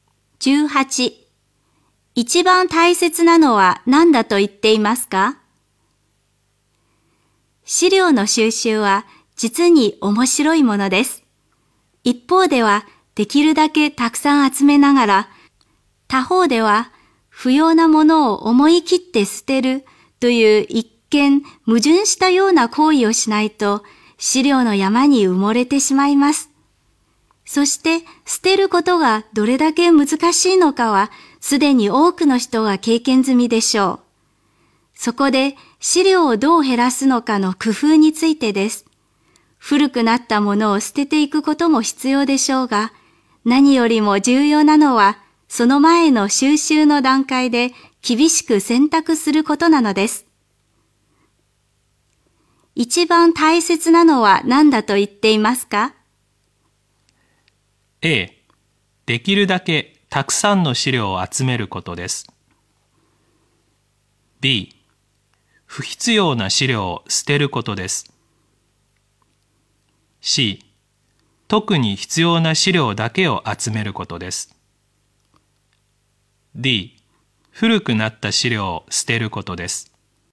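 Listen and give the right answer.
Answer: C: 特に必要な資料だけを集めることです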